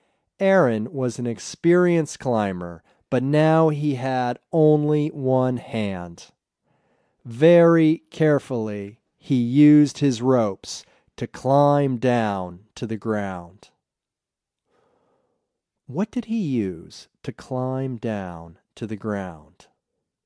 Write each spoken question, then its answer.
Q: What did he use to climb down to the ground?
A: He used his ropes to climb down to the ground.